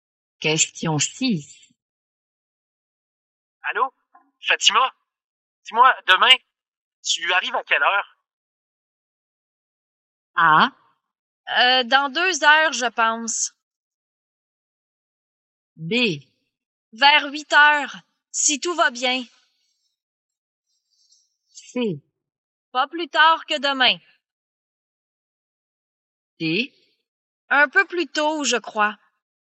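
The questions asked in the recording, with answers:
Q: Dis-moi, demain, tu arrives à quelle heure?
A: B: Vers 8 heures, si tout va bien.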